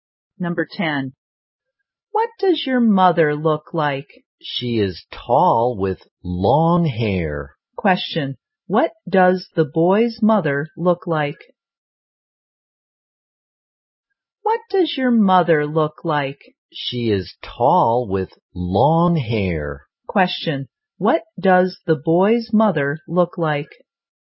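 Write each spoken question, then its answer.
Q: What does the boy's mother look like?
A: She is tall with long hair.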